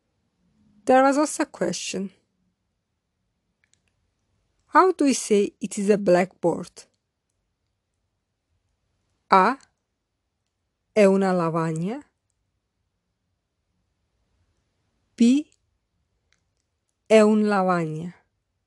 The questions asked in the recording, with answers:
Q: How do we say it is a blackboard?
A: The correct answer is A. È una lavagna.